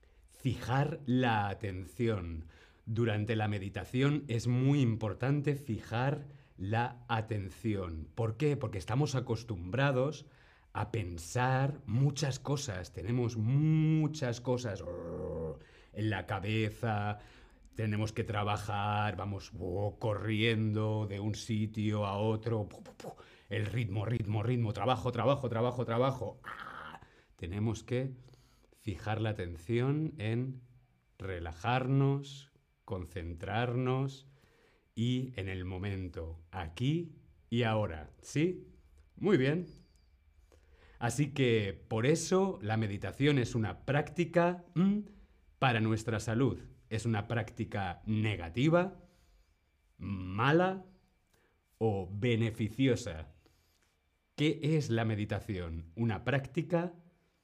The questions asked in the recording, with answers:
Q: ¿Qué es la meditación? Una práctica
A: Muy bien, correcto, es una práctica muy beneficiosa para nuestra salud mental y física.